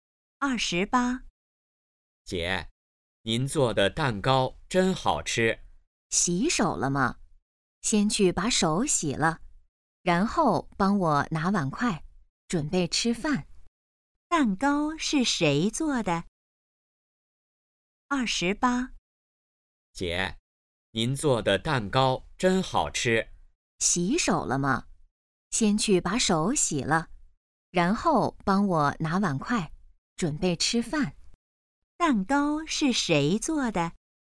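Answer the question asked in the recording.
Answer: 姐姐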